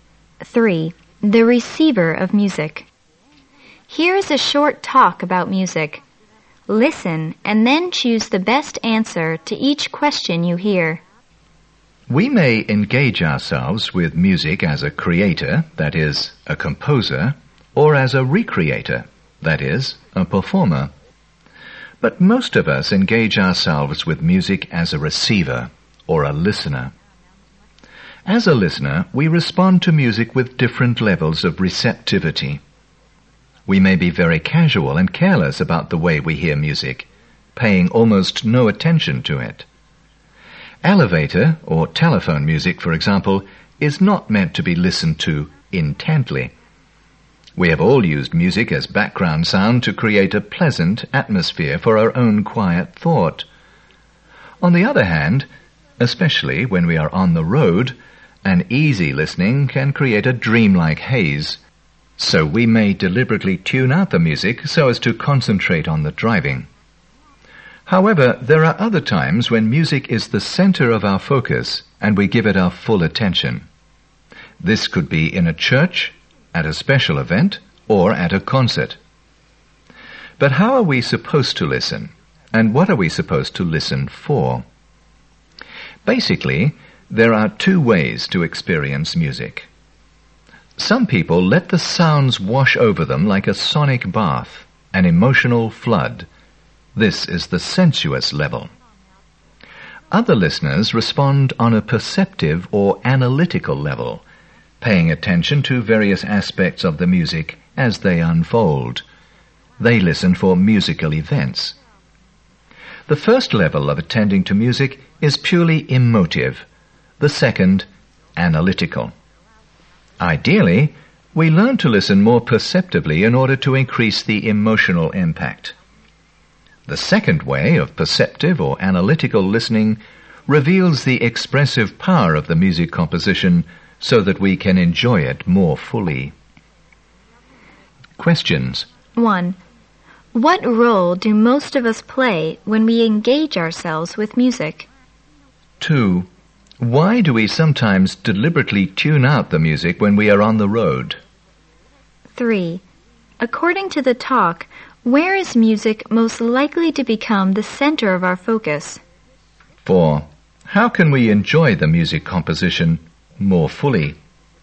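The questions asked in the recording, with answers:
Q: What role do most of us play when we engage ourselves with music?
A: A receiver or listener

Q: Why do we sometimes deliberately tune out the music when we are on the road?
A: To concentrate on the driving

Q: According to the talk, where is music most likely to become the center of our focus?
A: In a church, at a special event, or at a concert

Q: How can we enjoy the music composition more fully?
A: By listening perceptively or analytically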